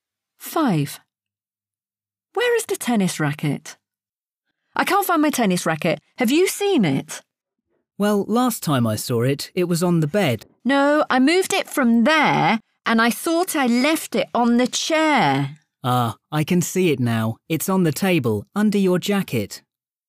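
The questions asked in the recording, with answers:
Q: Where is the tennis racket?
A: on the table, under the jacket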